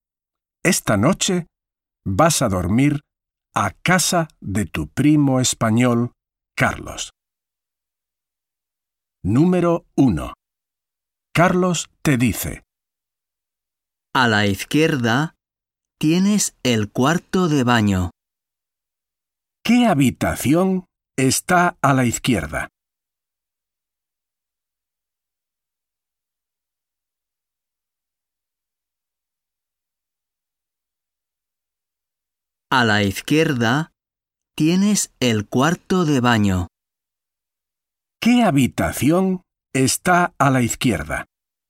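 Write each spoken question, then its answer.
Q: ¿Qué habitación está a la izquierda?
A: el cuarto de baño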